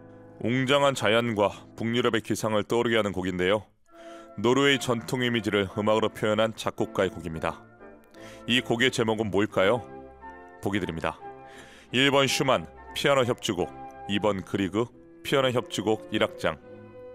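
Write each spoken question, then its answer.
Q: 이 곡의 제목은 뭘까요?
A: 2번: 그리그 피아노 협주곡 1악장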